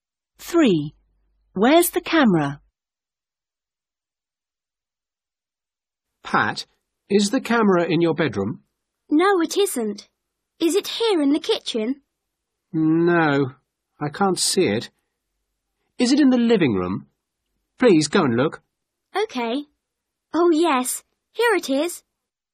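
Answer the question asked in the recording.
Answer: in the living room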